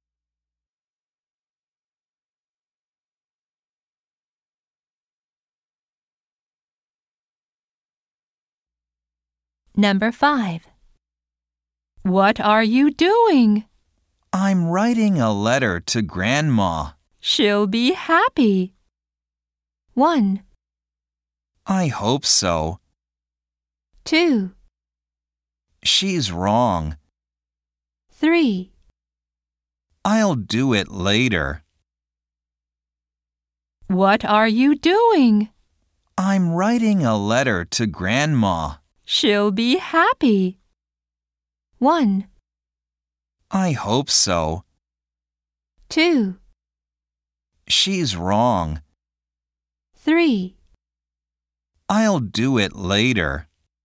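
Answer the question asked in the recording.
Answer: 1: I hope so.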